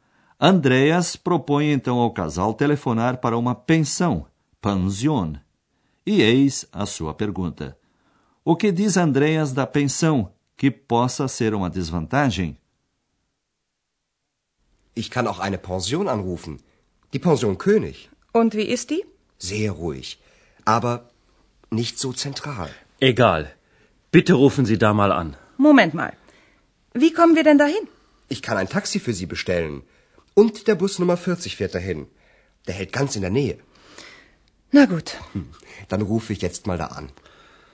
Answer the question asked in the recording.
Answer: Andreas diz que a pensão é muito tranquila, mas que não é bem central.